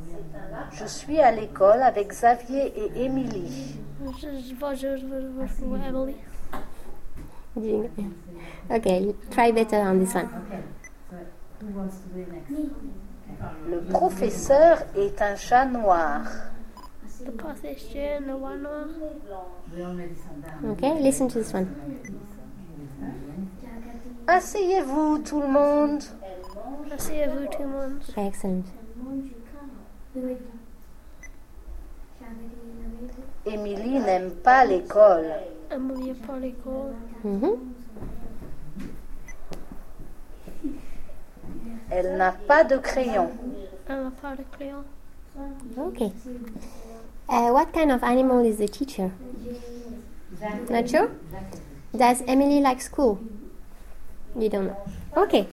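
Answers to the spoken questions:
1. A black cat
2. No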